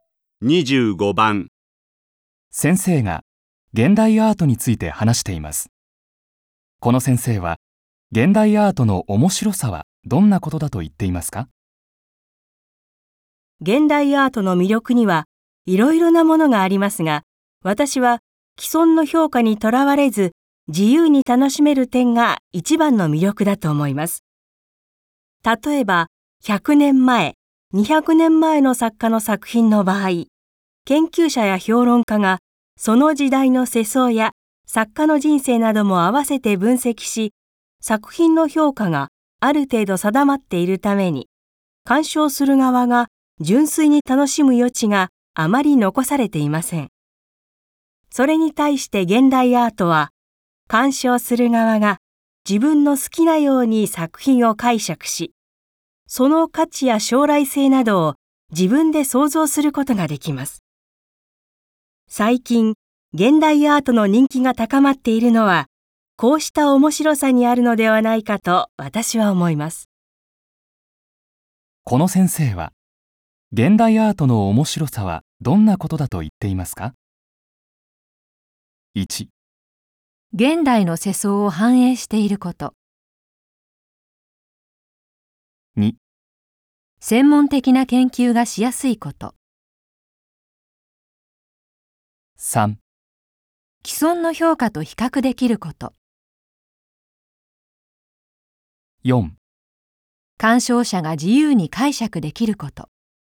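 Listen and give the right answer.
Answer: 4: 鑑賞者が自由に解釈できること。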